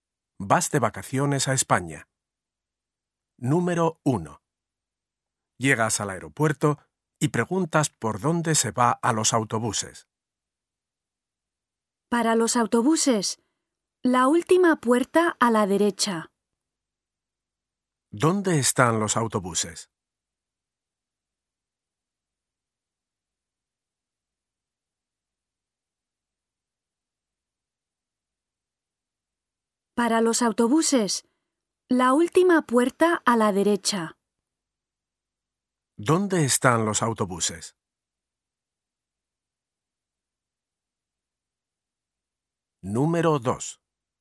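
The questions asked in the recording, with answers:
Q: ¿Dónde están los autobuses?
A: La última puerta a la derecha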